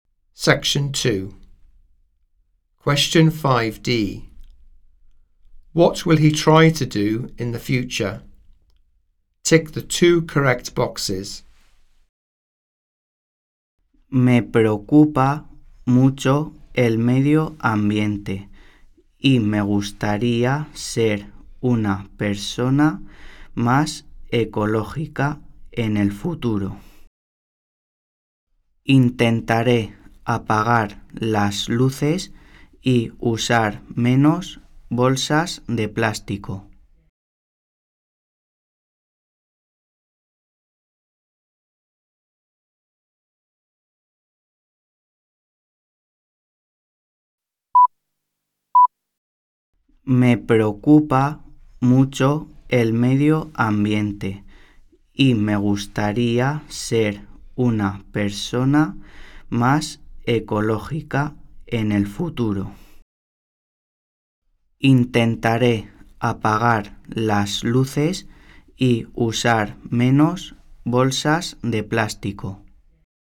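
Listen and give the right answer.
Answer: Turn off the lights and use fewer plastic bags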